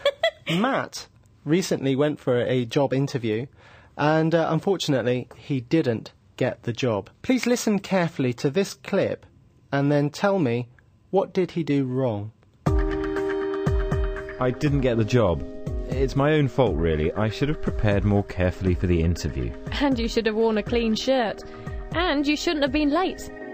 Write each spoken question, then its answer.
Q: what did he do wrong?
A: Matt made three mistakes at his job interview. Firstly, he wasn't very well prepared. Secondly, he didn't wear a clean shirt. And thirdly, he was late.